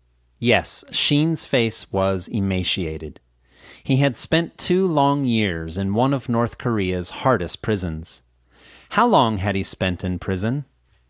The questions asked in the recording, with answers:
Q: How long had he spent in prison?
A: He had spent 2 long years in prison.